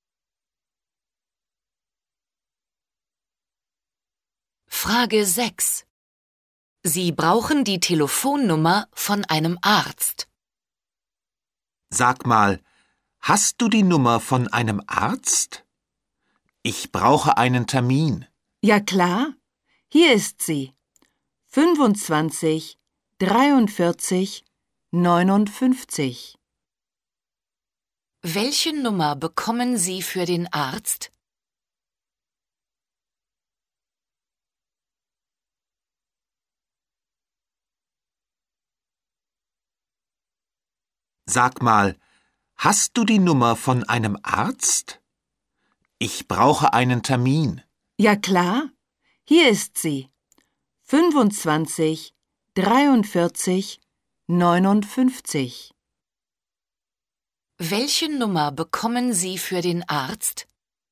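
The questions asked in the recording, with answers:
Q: Welche Nummer bekommen Sie für den Arzt?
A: 25 43 59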